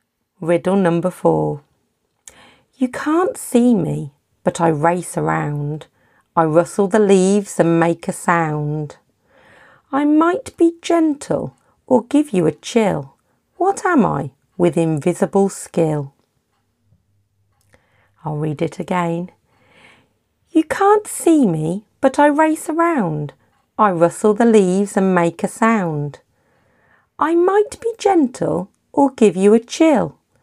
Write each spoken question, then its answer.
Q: What am I with invisible skill?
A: The answer was wind